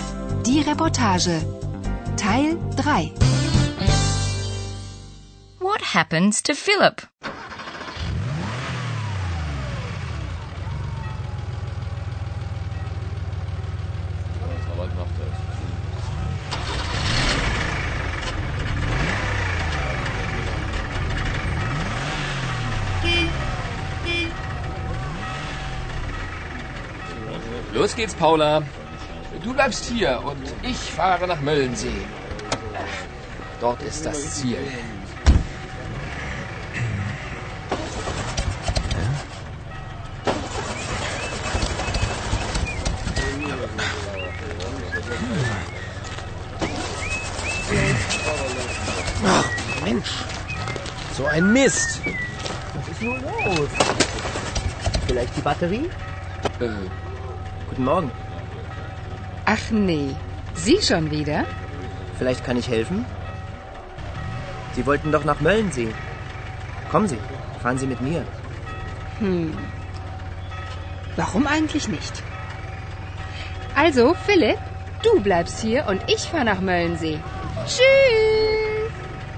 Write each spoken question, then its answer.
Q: What happens to Philip?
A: His car won't start.